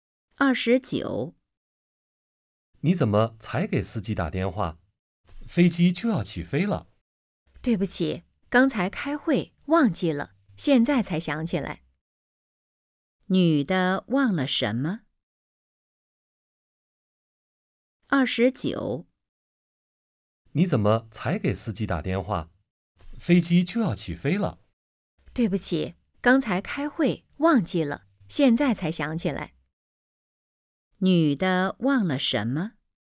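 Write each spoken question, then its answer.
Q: 女的忘了什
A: 给司机打电话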